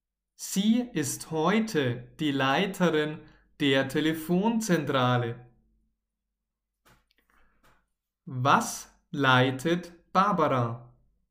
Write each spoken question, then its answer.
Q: Was leitet Barbara?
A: Eine Telefonzentrale Barbara leitet eine Telefonzentrale.